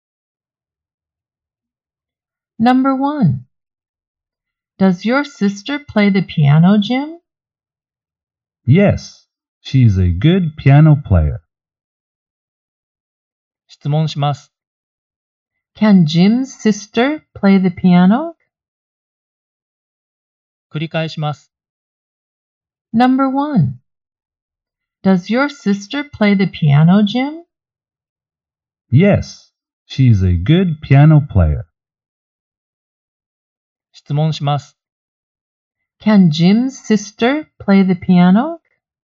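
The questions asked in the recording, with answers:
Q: Can Jim's sister play the piano?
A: Yes, she can.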